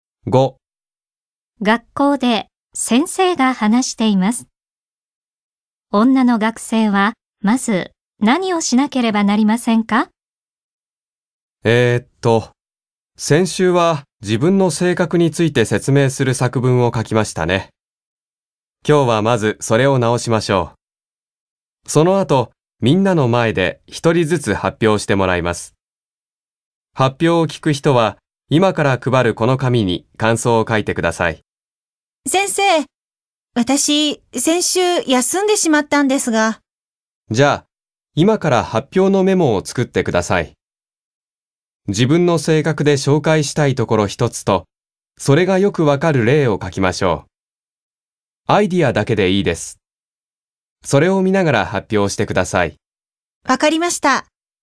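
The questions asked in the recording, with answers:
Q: 女の学生はまず何をしなければなりませんか?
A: 発表のメモを作る(自分の性格で紹介したいところと例を書く)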